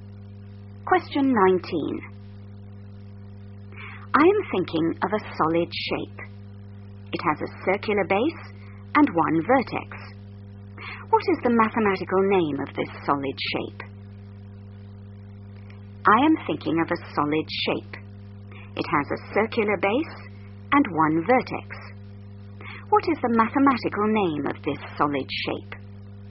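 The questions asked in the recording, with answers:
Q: What is the mathematical name of this solid shape?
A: cone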